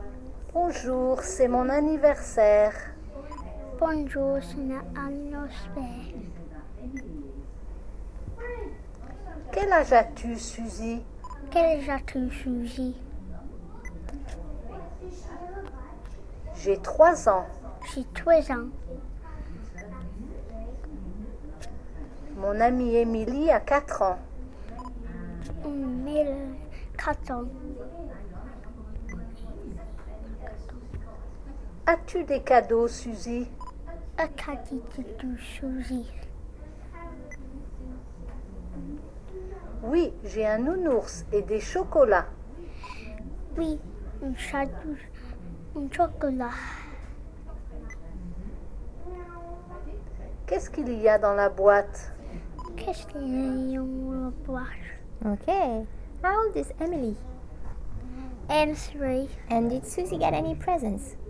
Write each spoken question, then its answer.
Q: And did Suzy get any presents?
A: Yeah.